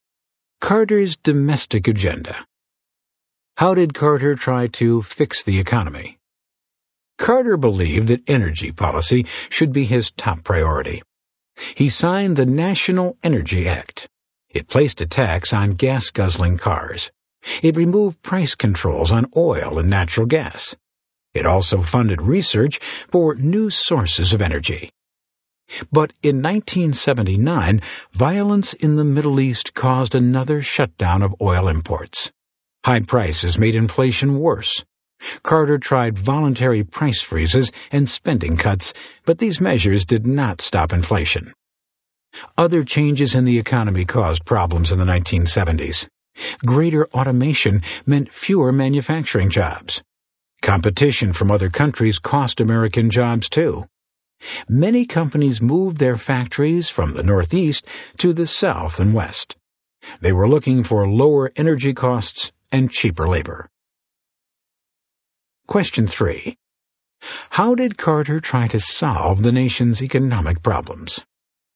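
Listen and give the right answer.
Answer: National Energy Act, voluntary price freezes and spending cuts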